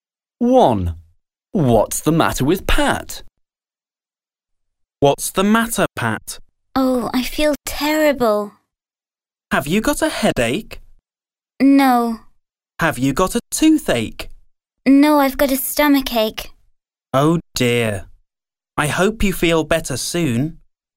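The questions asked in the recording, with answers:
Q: What's the matter with Pat?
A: She has a stomachache.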